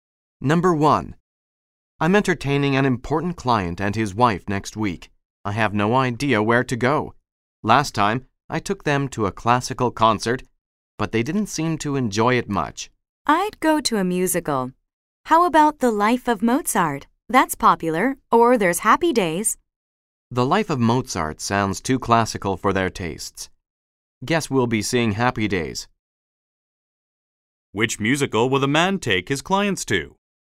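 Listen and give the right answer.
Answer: Happy Days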